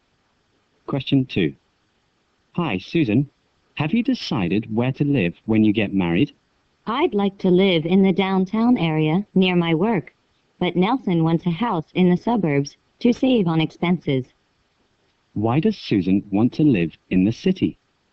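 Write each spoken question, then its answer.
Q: Why does Susan want to live in the city?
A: To be near her work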